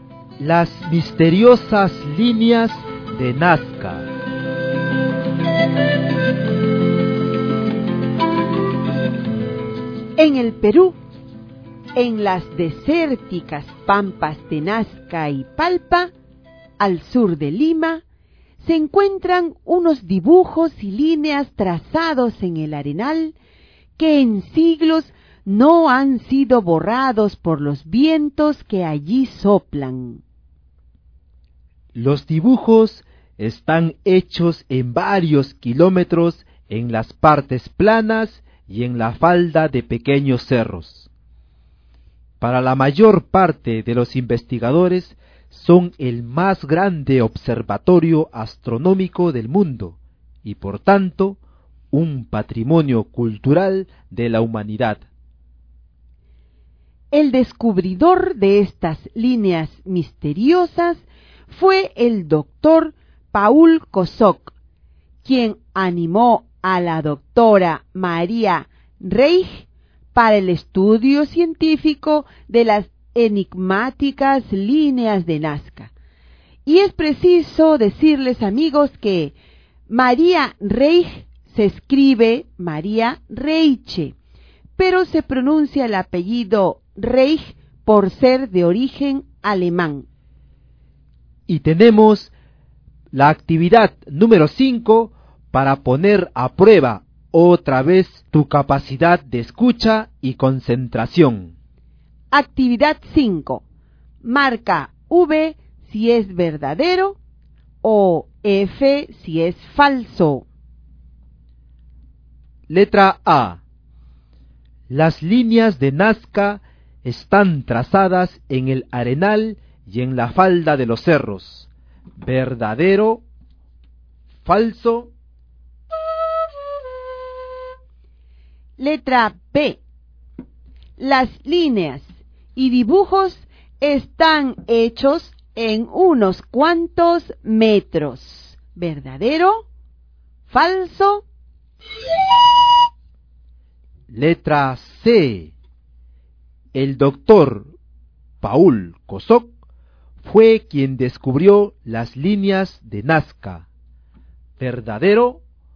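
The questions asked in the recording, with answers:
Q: Las líneas de Nazca están trazadas en el arenal y en la falda de los cerros.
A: Verdadero

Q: Las líneas y dibujos están hechos en unos cuantos metros.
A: Falso

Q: El doctor Paul Kosok fue quien descubrió las líneas de Nazca.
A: Verdadero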